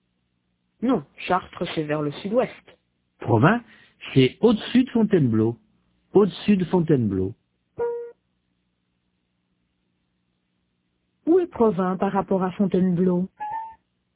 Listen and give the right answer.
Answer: Au-dessus.